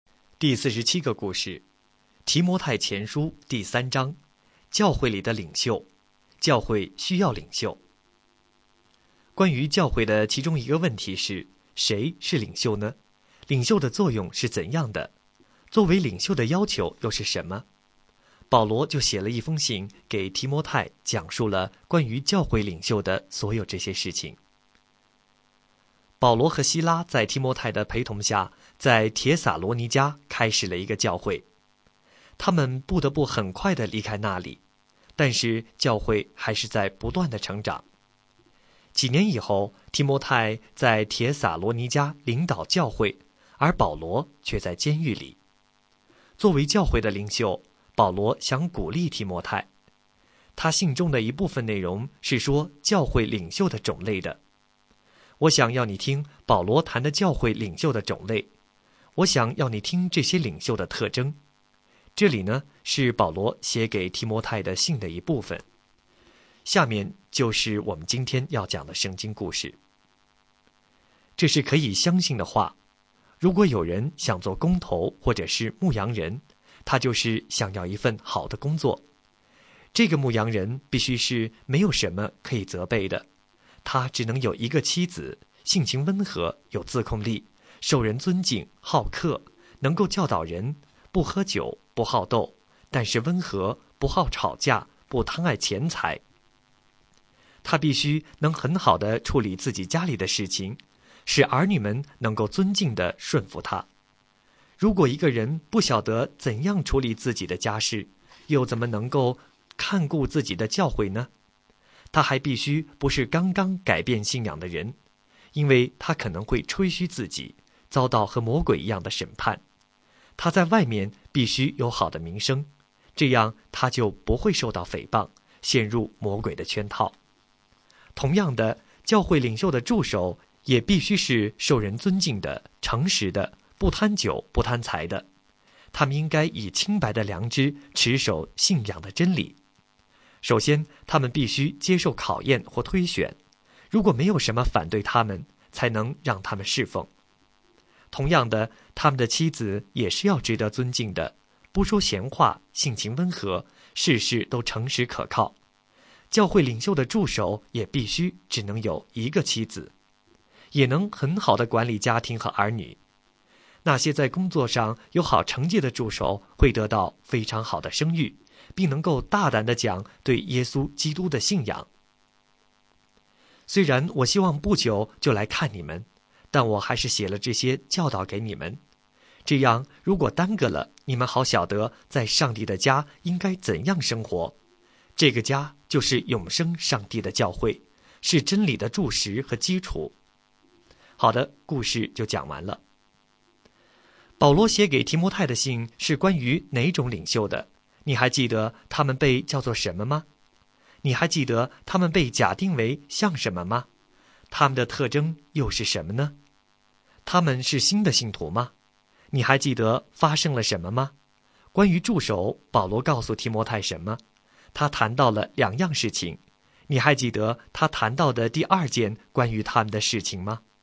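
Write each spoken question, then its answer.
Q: 保罗写给提摩太的信是关于哪种领袖的?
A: 教会领袖

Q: 你还记得他们被叫做什么吗?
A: 工头或者牧羊人

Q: 他们是新的信徒吗?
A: 不是,不能是刚刚改变信仰的人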